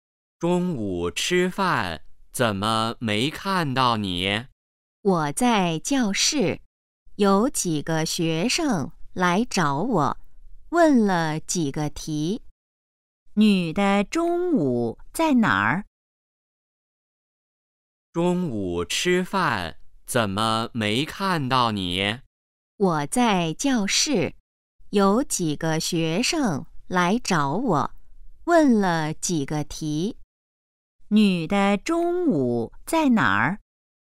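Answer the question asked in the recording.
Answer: 在教室

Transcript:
男:中午吃饭怎么没看到你?
女:我在教室,有几个学生来找我,问了几个题。
问:女的中午在哪儿?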